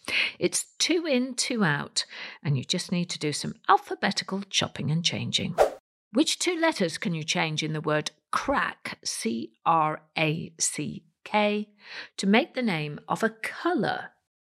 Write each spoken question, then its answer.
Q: Which two letters can you change in the word crack, C R A C K, to make the name of a colour.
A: Well, change the letter C for a letter B and the letter R to an L, and you get the word Black, B L A C K.